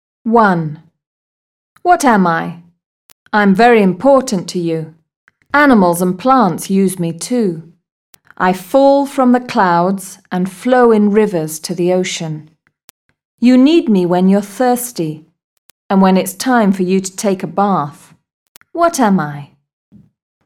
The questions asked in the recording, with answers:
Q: What am I?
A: Water.